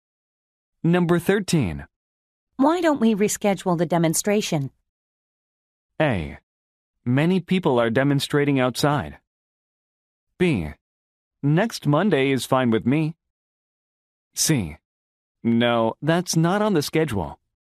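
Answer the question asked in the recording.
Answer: B: Next Monday is fine with me.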